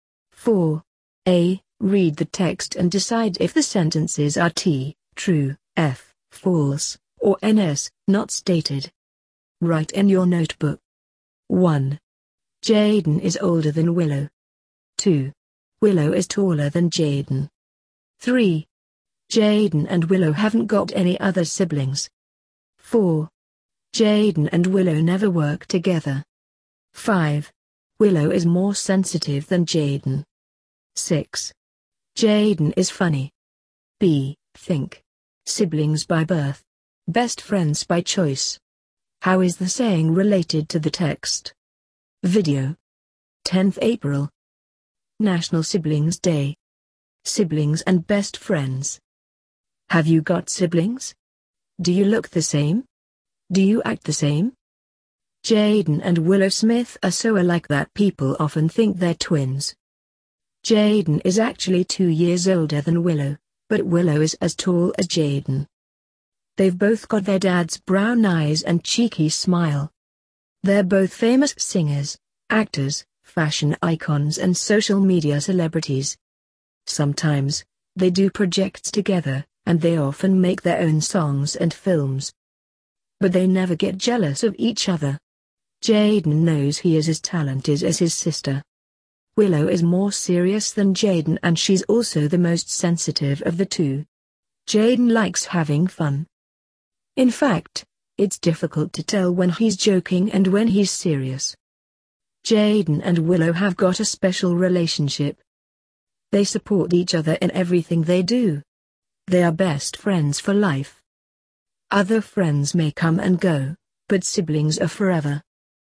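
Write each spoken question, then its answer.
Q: Jaden is older than Willow.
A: T (true)

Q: Willow is taller than Jaden.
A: F (false)

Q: Jaden and Willow haven't got any other siblings.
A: NS (not stated)

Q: Jaden and Willow never work together.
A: F (false)

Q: Willow is more sensitive than Jaden.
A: T (true)

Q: Jaden is funny.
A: T (true)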